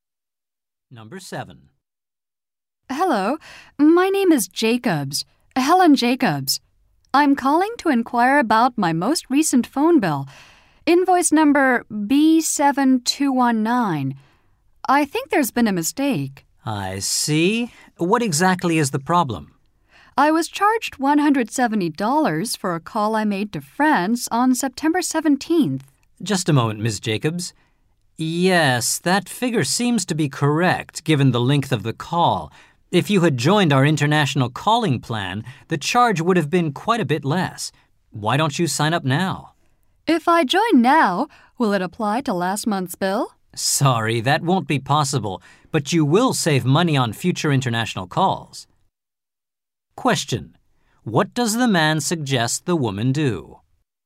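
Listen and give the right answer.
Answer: Sign up for the international calling plan.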